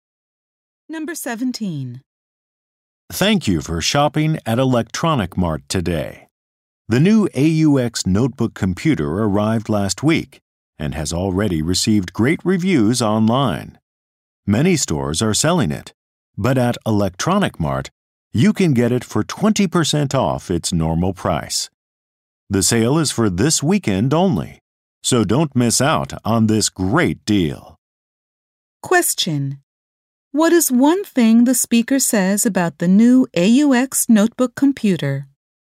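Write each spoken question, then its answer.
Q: What is one thing the speaker says about the new AUX notebook computer?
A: It is 20% off this weekend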